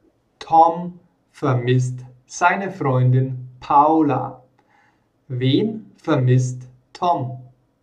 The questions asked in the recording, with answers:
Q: Wen vermisst Tom?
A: Paula. Er vermisst seine Freundin Paula.